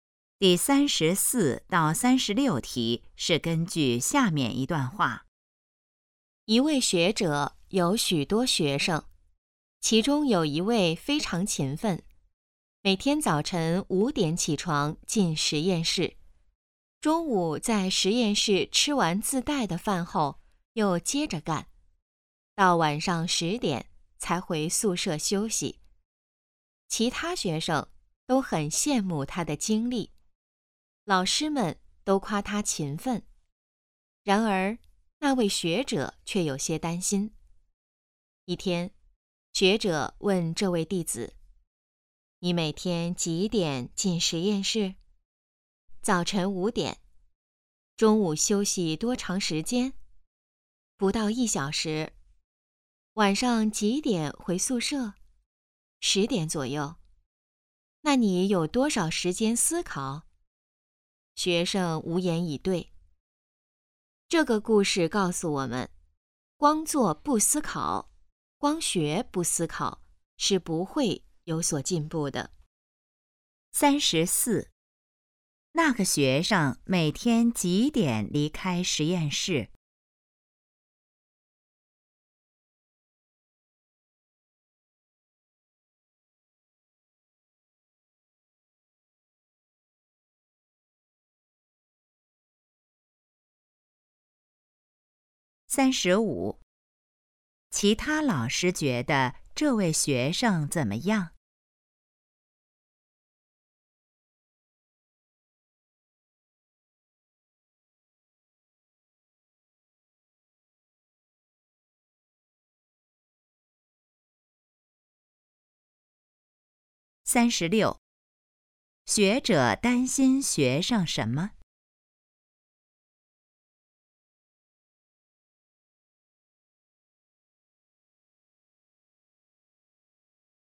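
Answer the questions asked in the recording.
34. 晚上10点左右
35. 很勤奋
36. 没有时间思考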